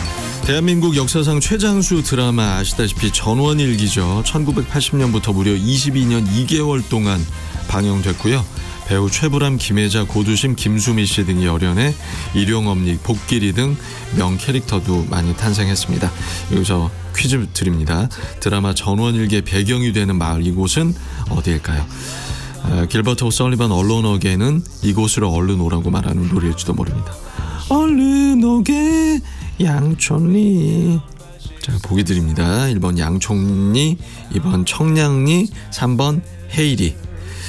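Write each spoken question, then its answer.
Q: 드라마 전원일기의 배경이 되는 마을, 이곳은 어디일까요?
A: 1번: 양촌리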